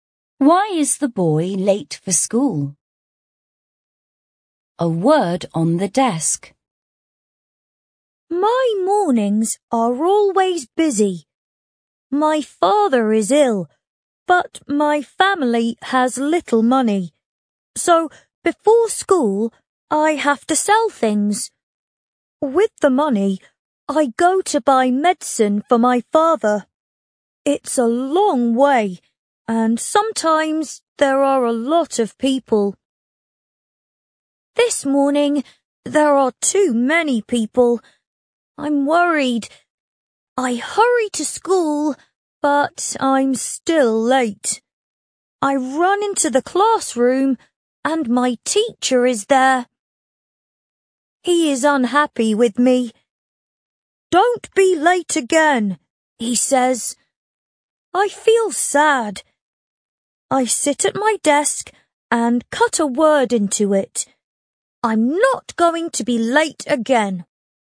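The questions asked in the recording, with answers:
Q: Why is the boy late for school?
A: Before school he has to sell things and buy medicine for his sick father, and this morning there were too many people.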